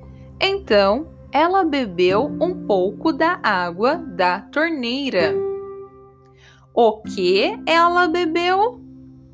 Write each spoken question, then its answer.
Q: O que ela bebeu?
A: Água da torneira. Ela bebeu um pouco da água da torneira.